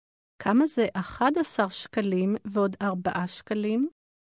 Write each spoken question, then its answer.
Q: כמה זה 11 שקלים ועוד 4 שקלים?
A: 15 שקלים.